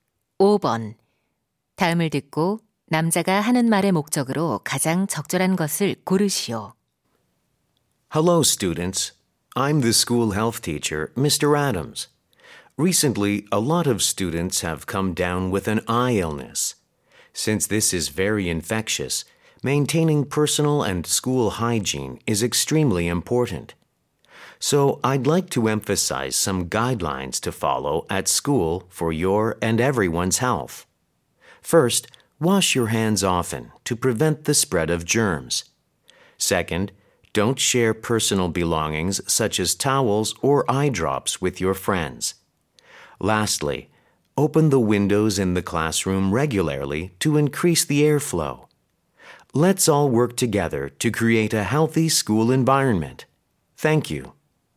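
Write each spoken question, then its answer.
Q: 다음을 듣고 남자가 하는 말의 목적으로 가장 적절한 것을 고르시오.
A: 눈병 예방을 위한 학교 위생 수칙 준수를 당부하려고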